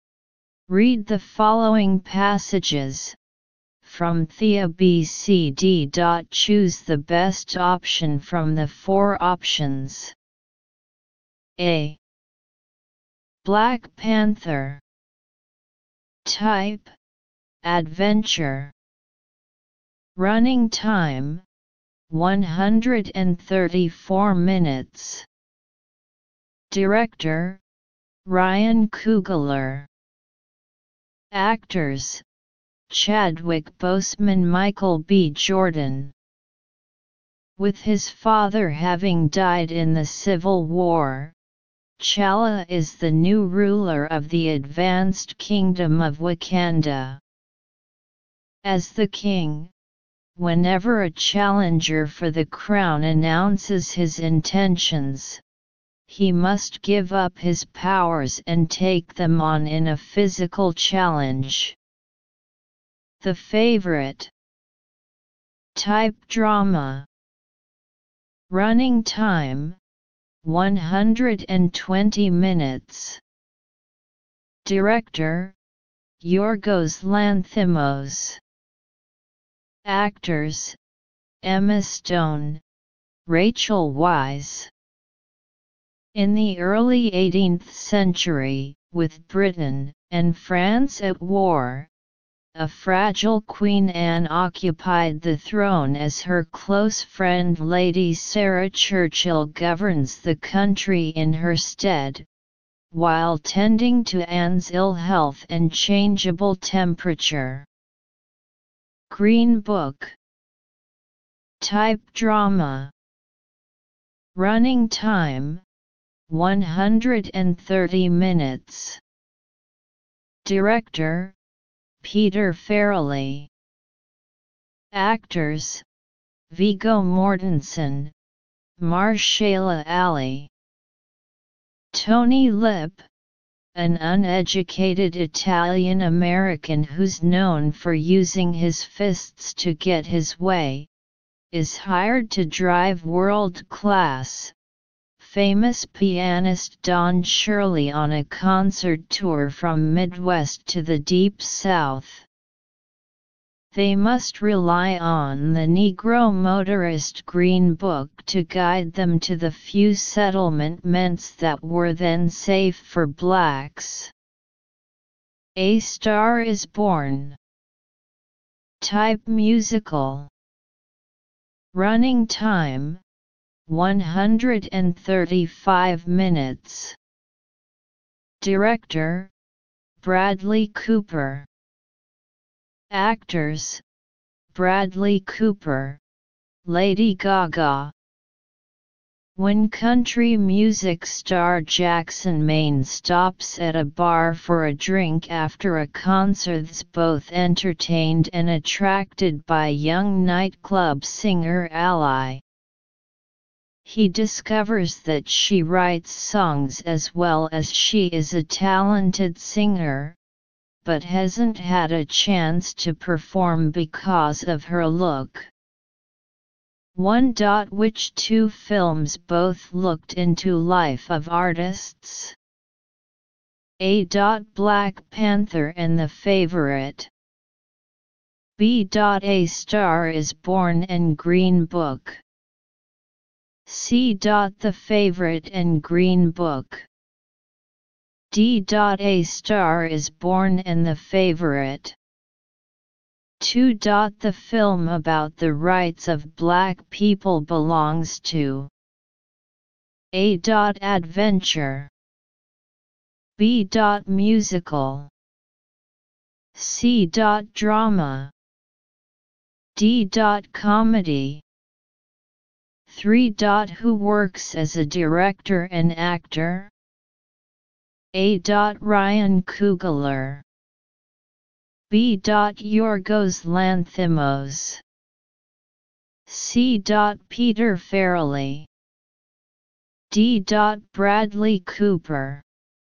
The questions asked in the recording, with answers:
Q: Which two films both looked into life of artists?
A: Answer 1. B.

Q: The film about the rights of black people belongs to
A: 2. C.

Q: Who works as a director and actor?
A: 3. D.